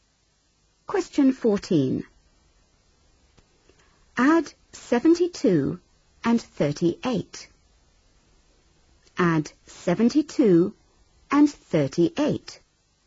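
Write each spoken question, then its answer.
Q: Add 72 and 38.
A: 110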